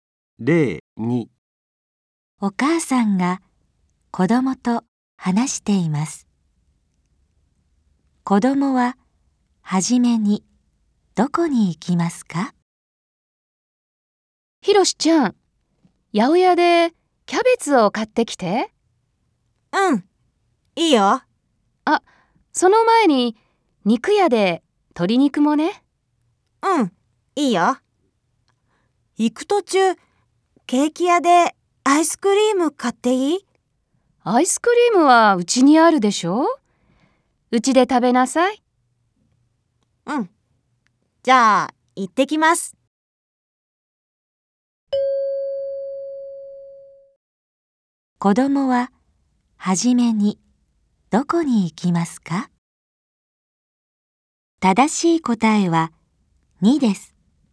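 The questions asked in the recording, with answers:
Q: 子供は初めにどこに行きますか?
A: 肉屋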